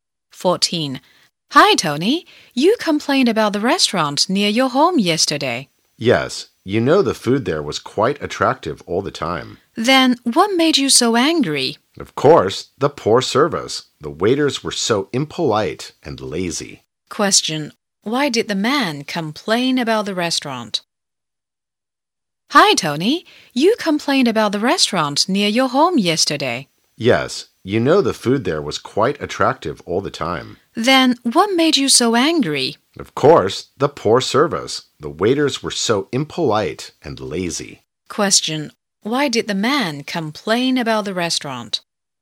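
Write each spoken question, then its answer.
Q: Why did the man complain about the restaurant?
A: Because of the poor service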